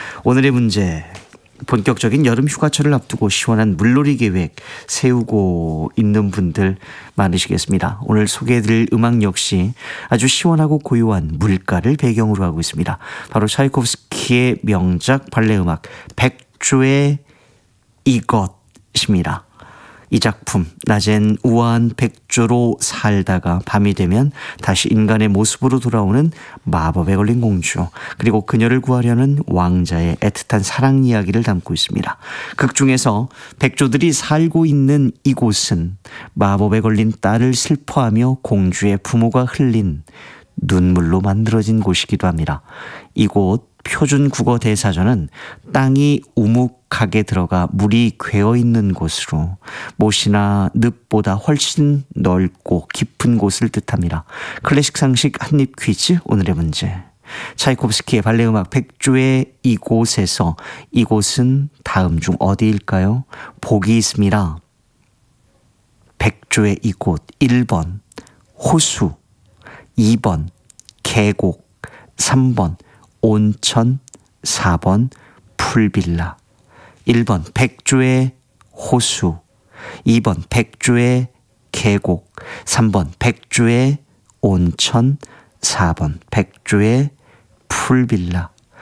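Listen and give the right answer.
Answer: 1번: 호수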